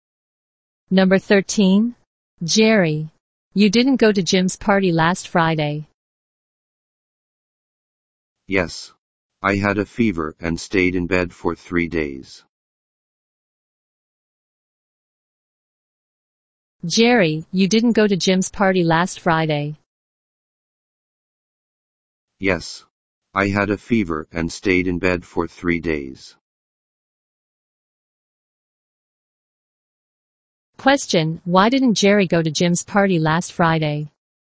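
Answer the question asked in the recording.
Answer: He had a fever.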